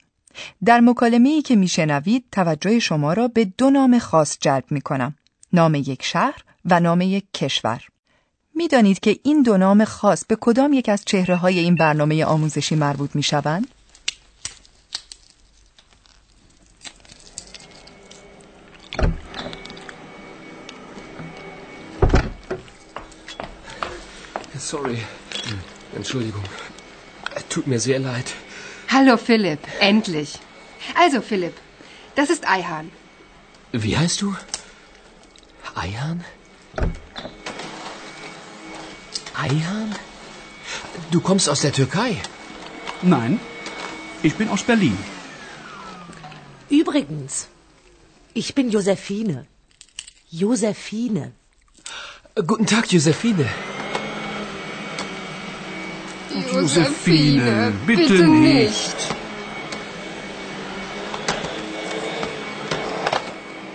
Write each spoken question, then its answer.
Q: میدانید که این دو نام خاص به کدام یک از چهره های این برنامه آموزشی مربوط می شوند؟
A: همانگونه که متوجه شدید در گفتگوی آنها از برلین و ترکیه سخن می رود.